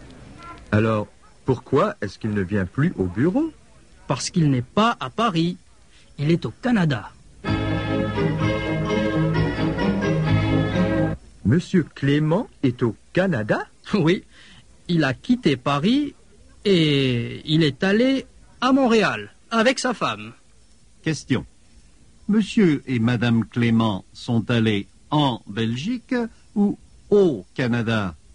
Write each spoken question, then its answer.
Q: Monsieur et Madame Clément sont allés en Belgique ou au Canada?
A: Ils sont allés au Canada.